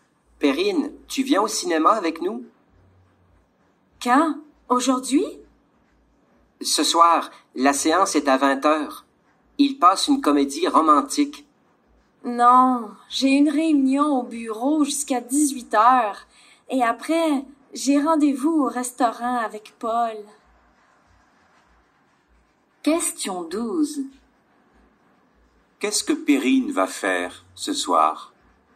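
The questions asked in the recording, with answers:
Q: Qu'est-ce que Perrine va faire ce soir?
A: Elle a une réunion au bureau jusqu'à 18h, puis elle va au restaurant avec Paul.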